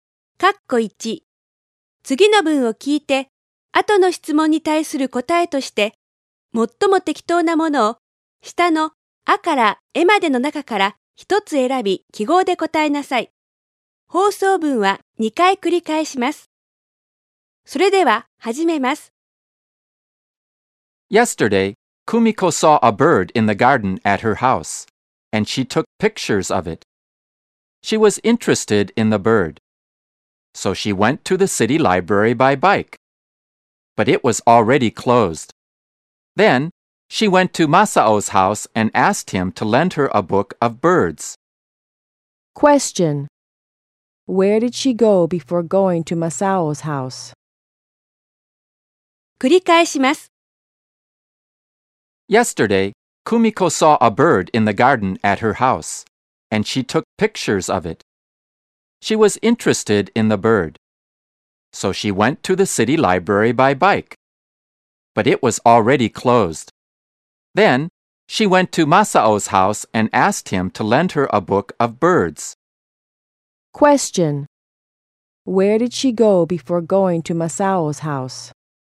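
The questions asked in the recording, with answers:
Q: Where did she go before going to Masao's house?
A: The city library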